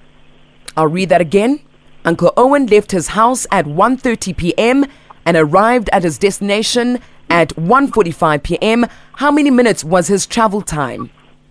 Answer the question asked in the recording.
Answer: 15 minutes.